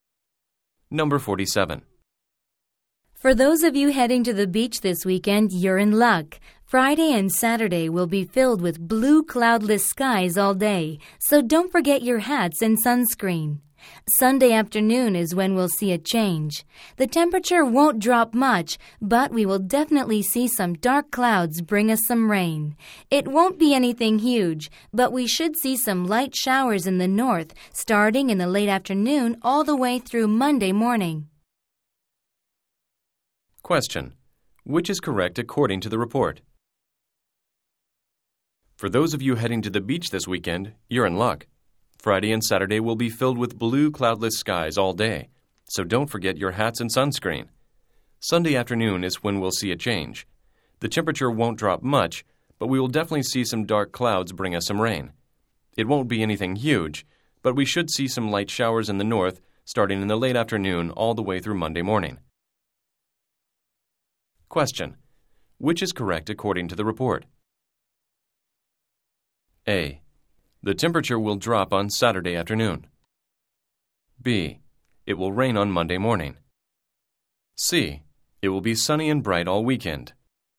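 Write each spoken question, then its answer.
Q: Which is correct according to the report?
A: B: It will rain on Monday morning.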